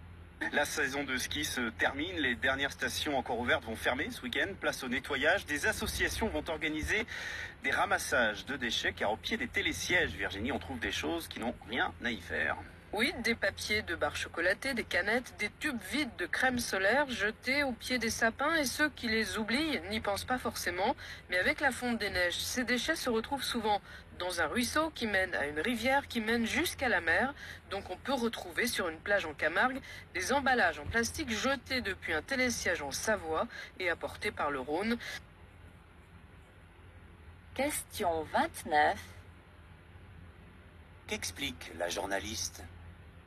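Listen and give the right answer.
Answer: Que les déchets jetés dans les stations de ski sont emportés par la fonte des neiges et les rivières jusqu'à la mer.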